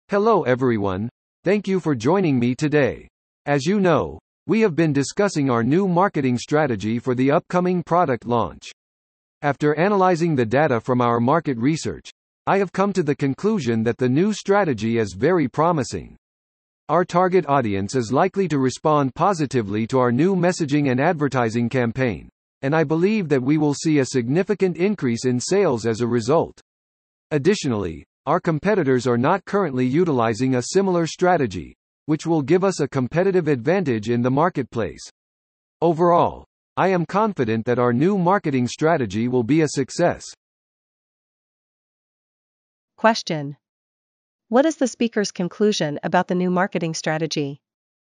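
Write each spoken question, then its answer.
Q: What is the speaker's conclusion about the new marketing strategy?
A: It is very promising and will be a success.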